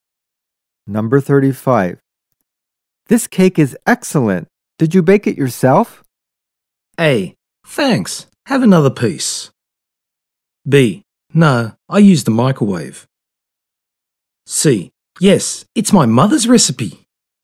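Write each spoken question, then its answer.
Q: This cake is excellent. Did you bake it yourself?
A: C: Yes, it's my mother's recipe.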